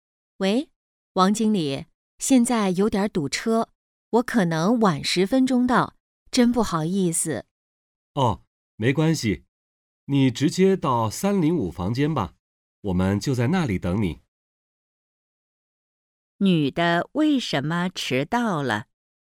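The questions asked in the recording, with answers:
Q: 女的为什么迟到了?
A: 堵车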